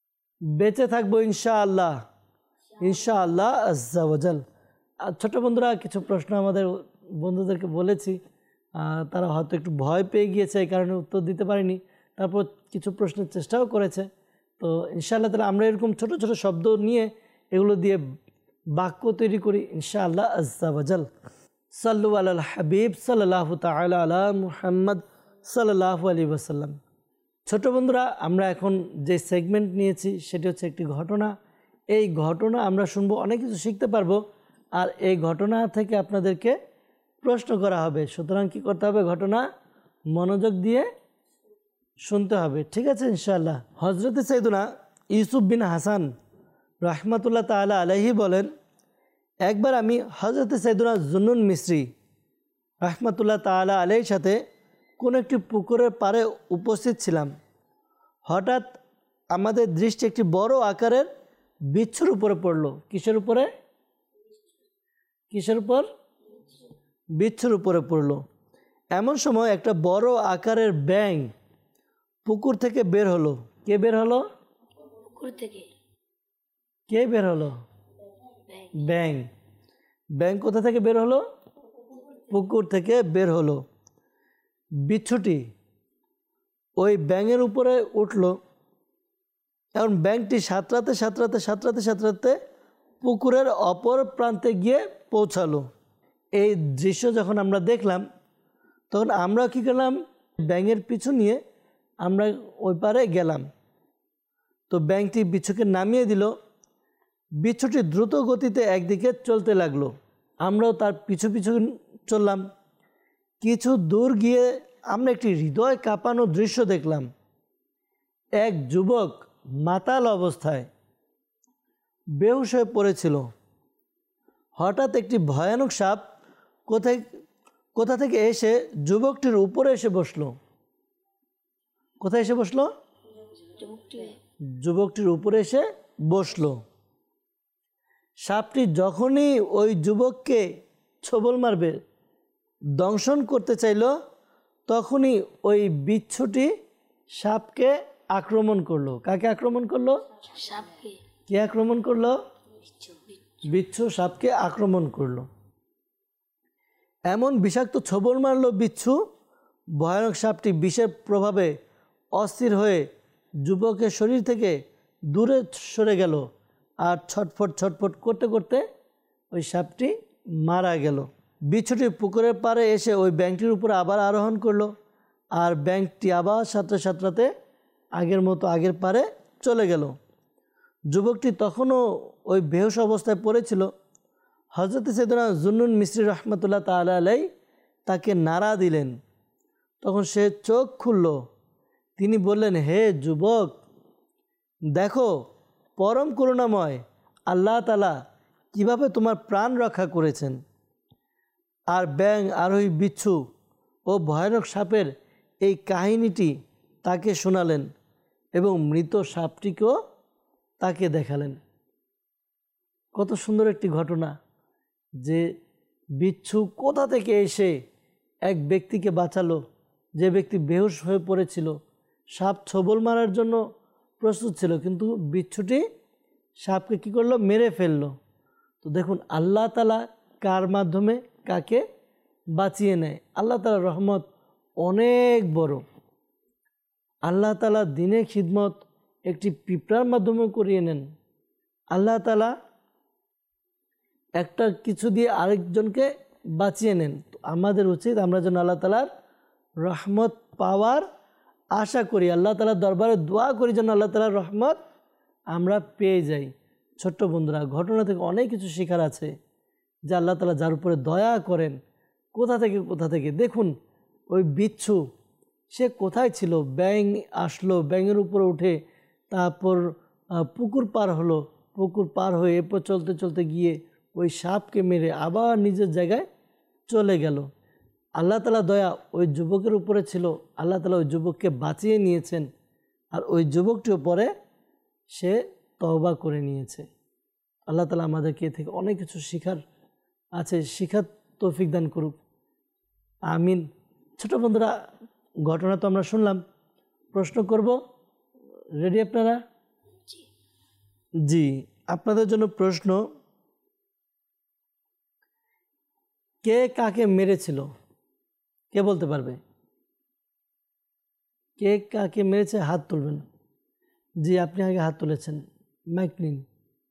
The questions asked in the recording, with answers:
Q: কে কাকে মেরেছিল, কে বলতে পারবে কে কাকে মেরেছে?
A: বিচ্ছু সাপকে মেরেছিল।